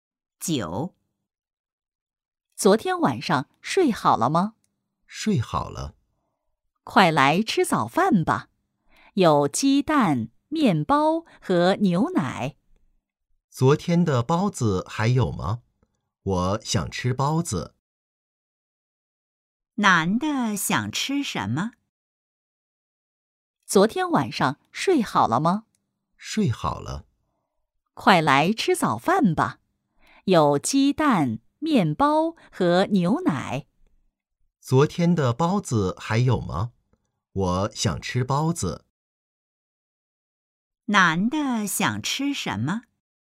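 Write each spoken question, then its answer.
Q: 男的想吃什么?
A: 包子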